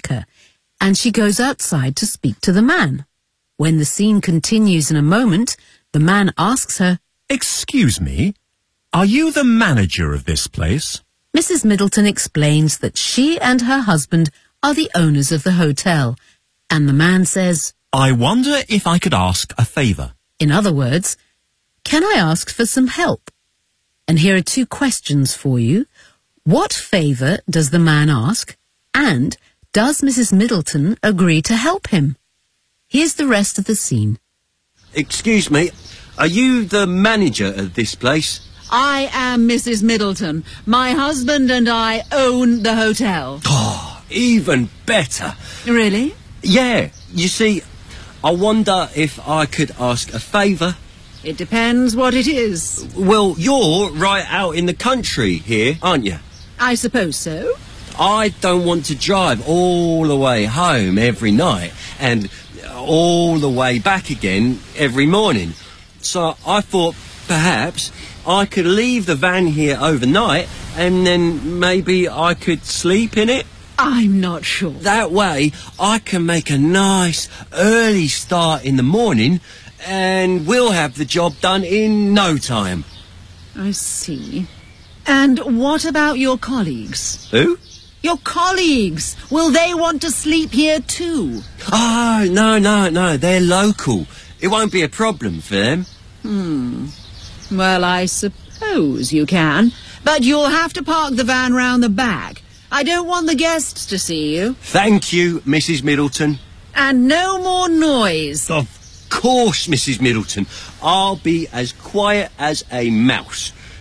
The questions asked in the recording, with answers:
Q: What favor does the man ask?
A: I thought perhaps I could leave the van here overnight, and then maybe I could sleep in it.

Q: Does Mrs. Middleton agree to help him?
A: Yes, she does, but she adds,